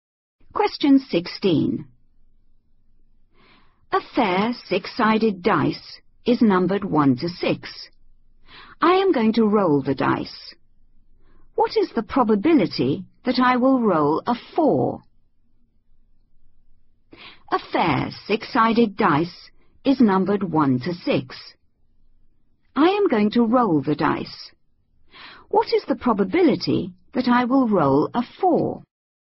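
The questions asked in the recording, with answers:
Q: What is the probability that I will roll a 4?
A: 1/6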